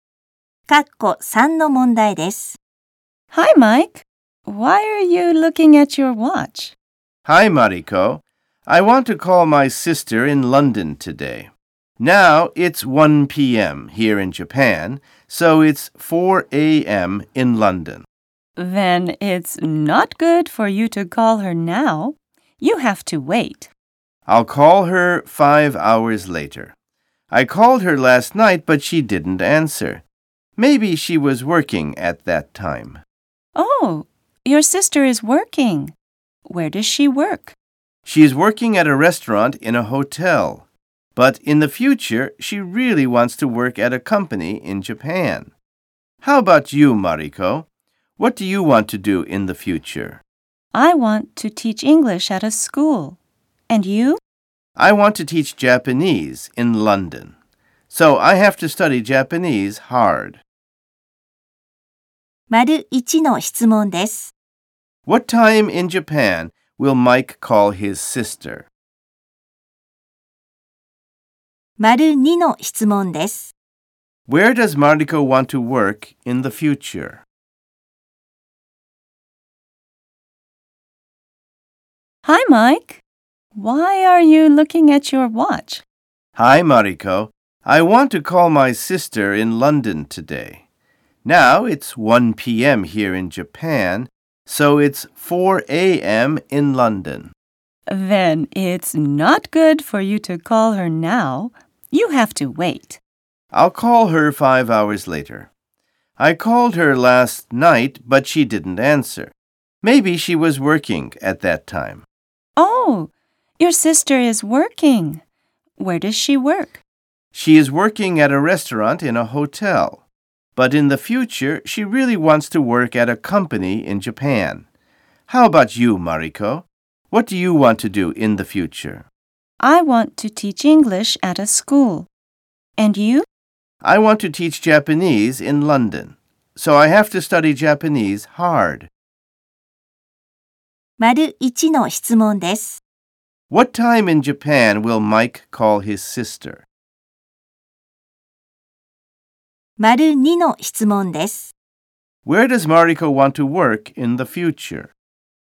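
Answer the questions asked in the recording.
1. At 6 p.m.
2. At a school, teaching English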